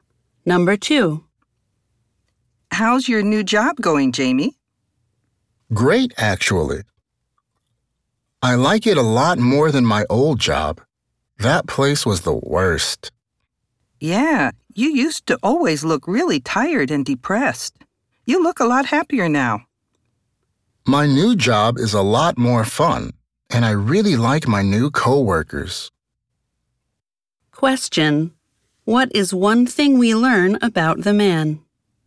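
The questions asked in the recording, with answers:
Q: what is one thing we learn about the man?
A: He likes his new job much more than his old job and is happier now.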